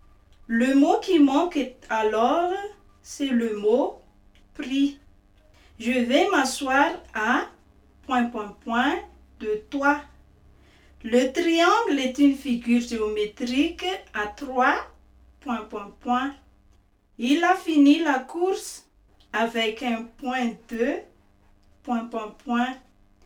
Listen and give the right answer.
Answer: Le mot qui manque alors, c'est le mot côté.